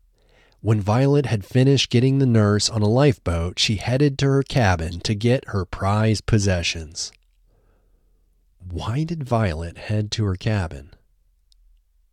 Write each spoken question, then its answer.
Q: Why did Violet head to her cabin?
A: Violet headed to her cabin to get her prized possessions.